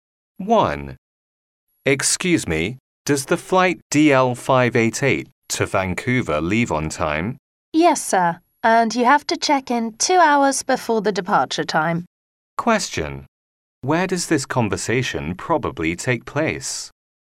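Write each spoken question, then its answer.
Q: Where does this conversation probably take place?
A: At an airport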